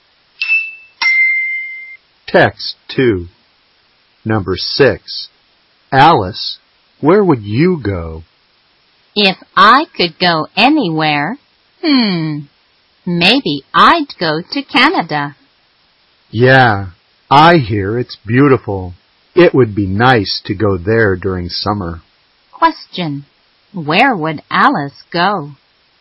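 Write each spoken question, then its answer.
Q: Question, where would Alice go?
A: Canada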